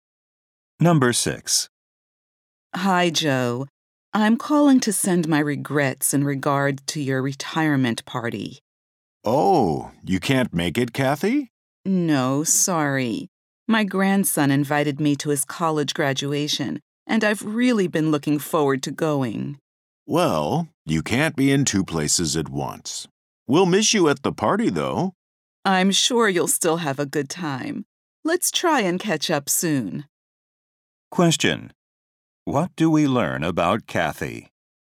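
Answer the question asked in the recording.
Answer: She can't go to Joe's retirement party because she is going to her grandson's college graduation.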